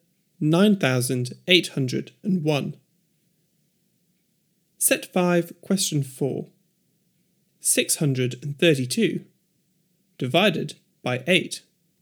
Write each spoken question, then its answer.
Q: 632 divided by 8.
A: 79.